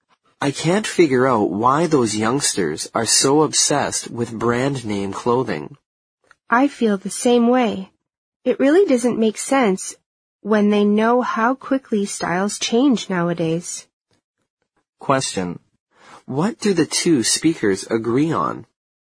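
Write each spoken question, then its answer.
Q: What do the two speakers agree on?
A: It makes no sense for young people to be obsessed with brand-name clothing, because styles change so quickly.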